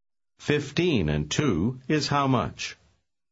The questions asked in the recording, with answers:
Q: 15 and 2 is how much?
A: 17.